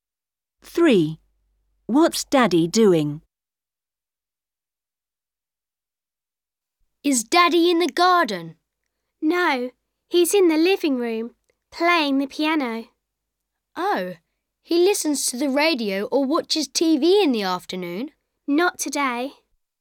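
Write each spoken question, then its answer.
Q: What's Daddy doing?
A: Playing the piano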